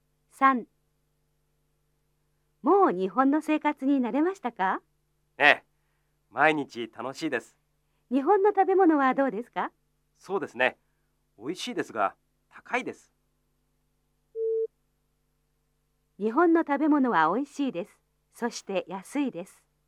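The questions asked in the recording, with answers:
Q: 日本の食べ物は美味しいです。そして安いです。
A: ×(高いです)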